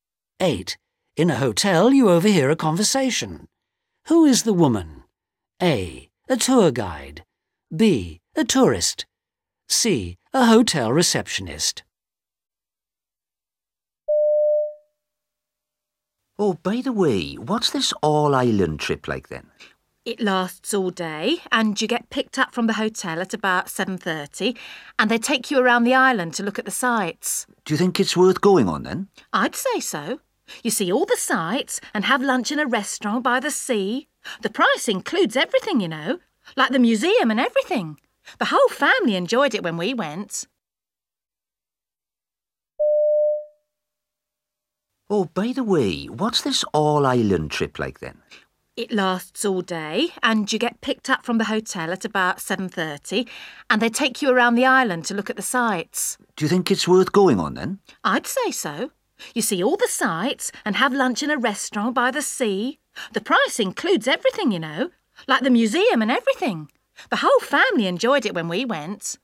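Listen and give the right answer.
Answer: B: A tourist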